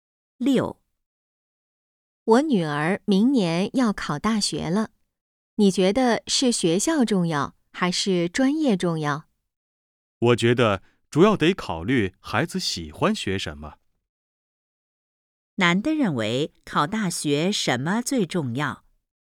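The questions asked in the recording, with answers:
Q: 男的认为考大学什么最重要?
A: 孩子喜欢学什么(孩子的兴趣)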